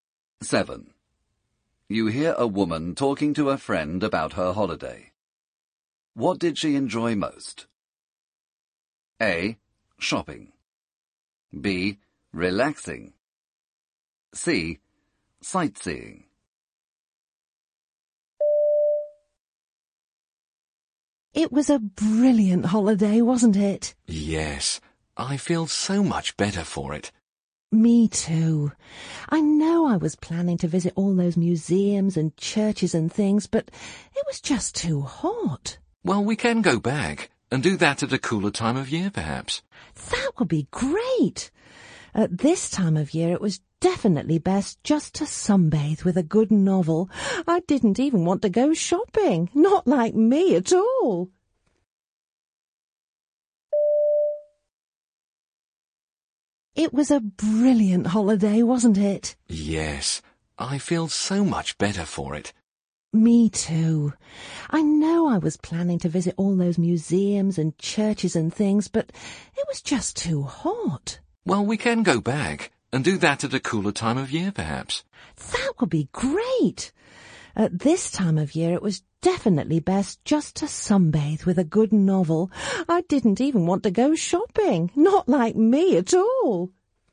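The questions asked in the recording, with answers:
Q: What did she enjoy most?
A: B: Relaxing.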